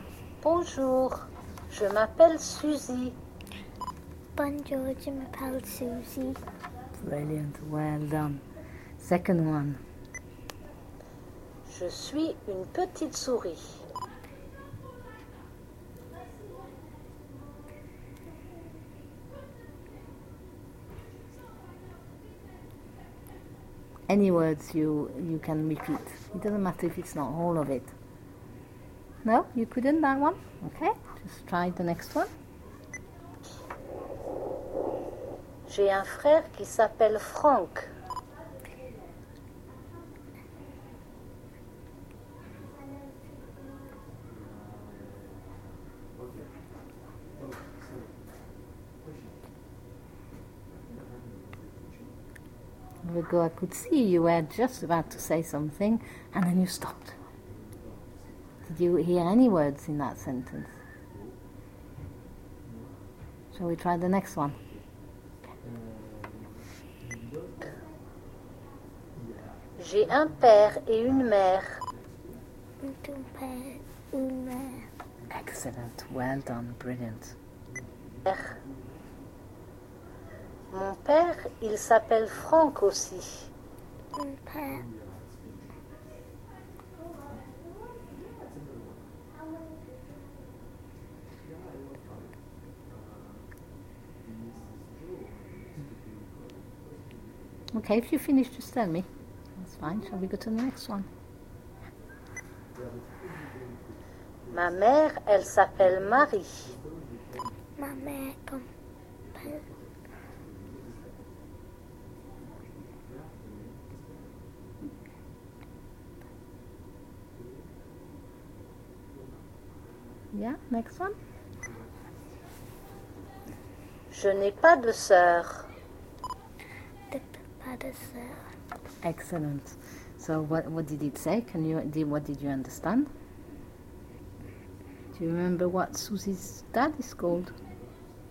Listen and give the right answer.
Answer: Frank.